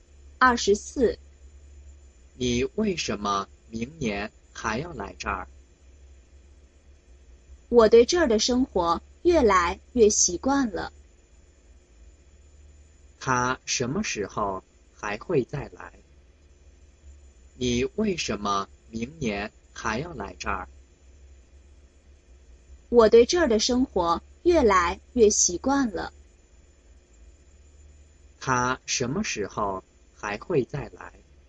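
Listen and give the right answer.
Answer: 明年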